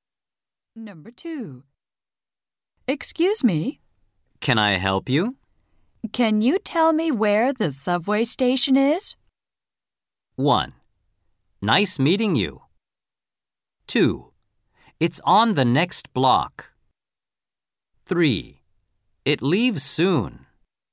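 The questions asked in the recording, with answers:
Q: Can you tell me where the subway station is?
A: 2: It's on the next block.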